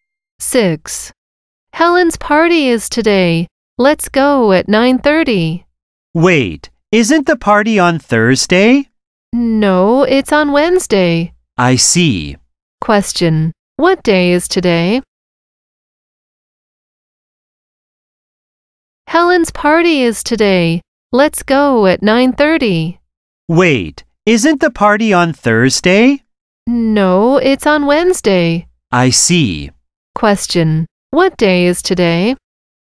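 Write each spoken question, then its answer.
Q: what day is today?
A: Wednesday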